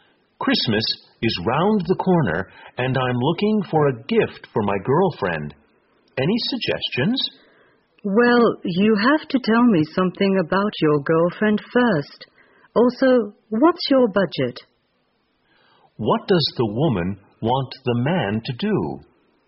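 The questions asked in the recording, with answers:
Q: What does the woman want the man to do?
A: Tell her about his girlfriend and his budget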